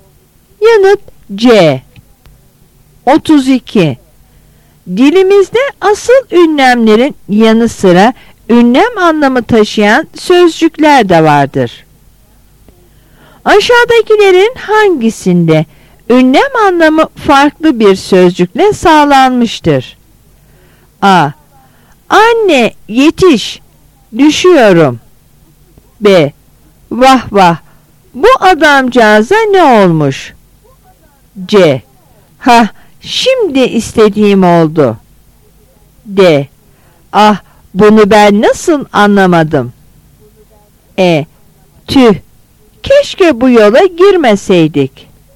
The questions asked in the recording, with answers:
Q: Aşağıdakilerin hangisinde ünlem anlamı farklı bir sözcükle sağlanmıştır?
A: Yanıt A.